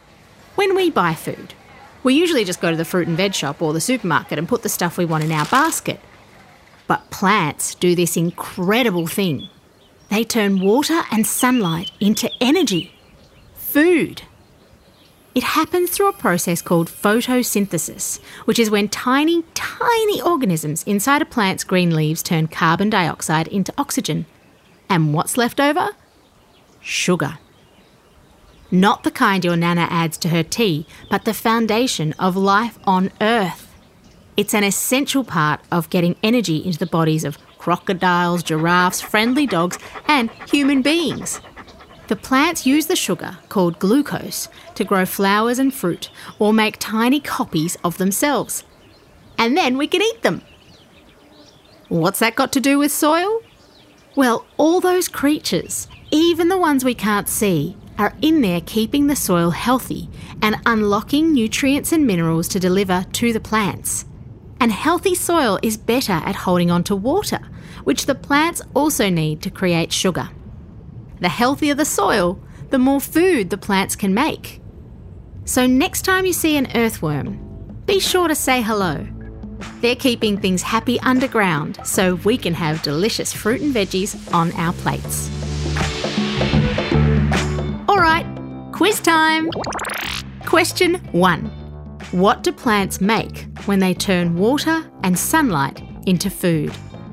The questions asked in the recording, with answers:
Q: What do plants make when they turn water and sunlight into food?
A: Glucose.